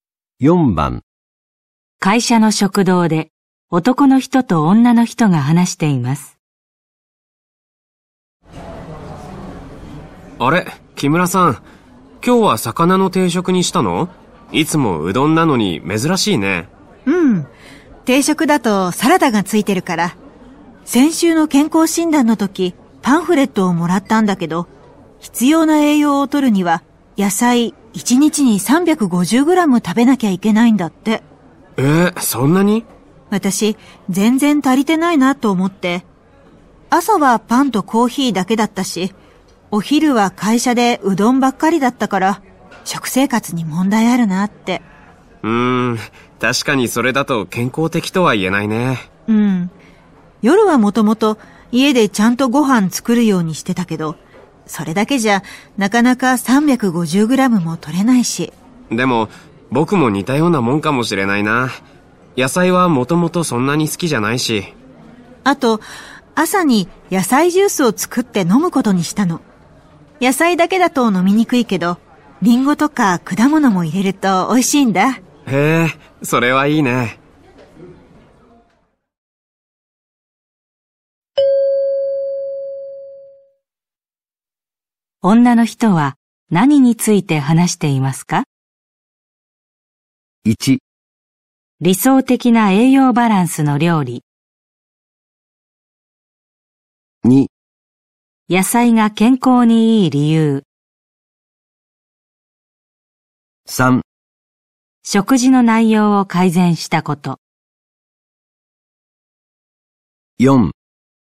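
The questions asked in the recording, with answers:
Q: 女の人は何について話していますか?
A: 3: 食事の内容を改善したこと。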